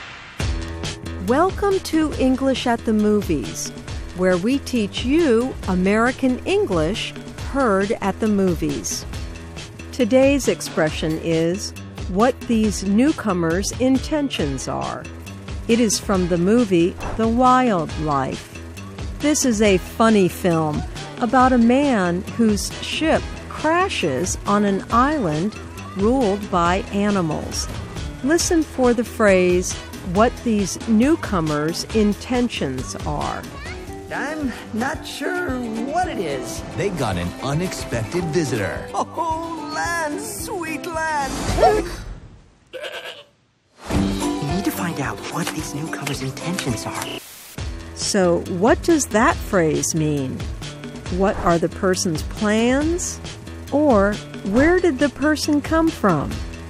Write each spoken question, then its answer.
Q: So, what does that phrase mean?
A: What these newcomers' intentions are means what are the person's plans?